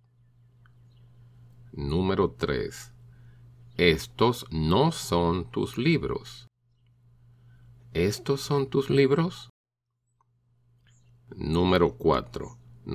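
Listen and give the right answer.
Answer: No, estos no son mis libros.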